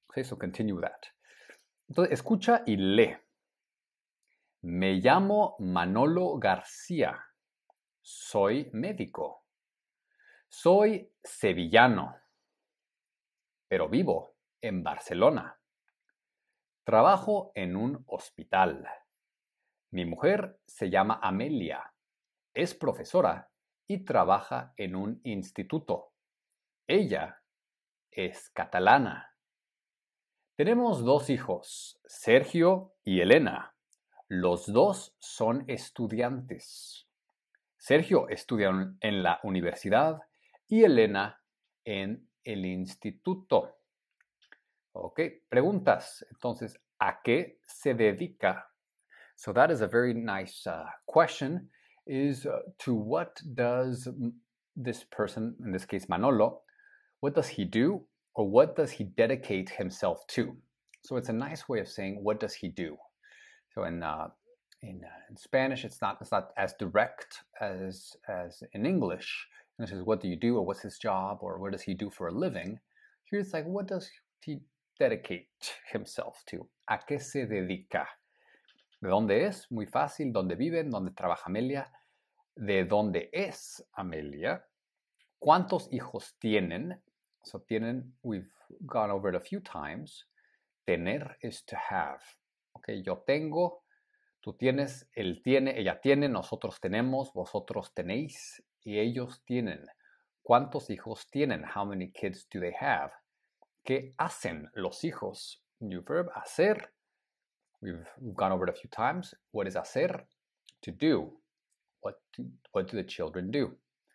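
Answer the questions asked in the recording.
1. Es médico.
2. Es sevillano (de Sevilla).
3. En Barcelona.
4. En un instituto.
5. Es catalana.
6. Dos.
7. Son estudiantes: Sergio estudia en la universidad y Elena en el instituto.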